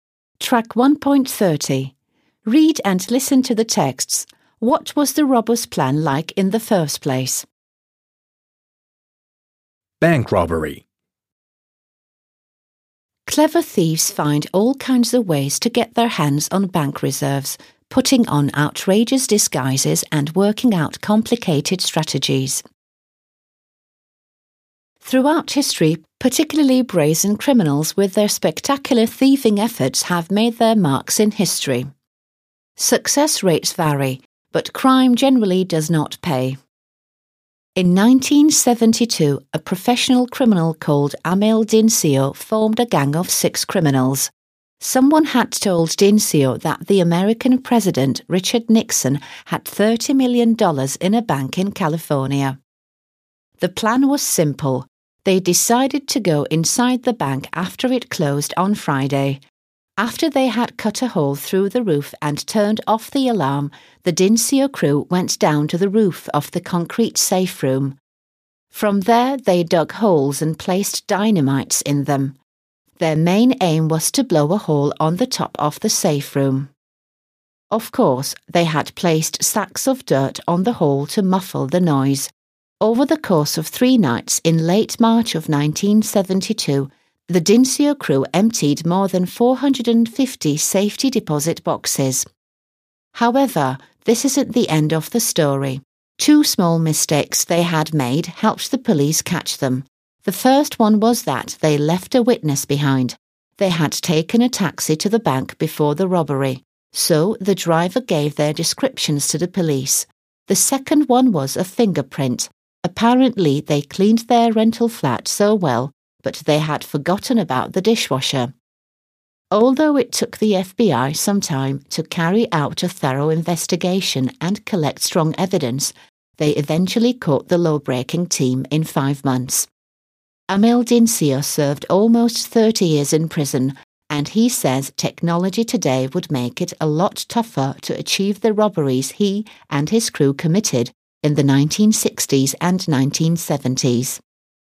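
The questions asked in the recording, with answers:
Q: What was the robber's plan like in the first place?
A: It was simple: go inside the bank after it closed on Friday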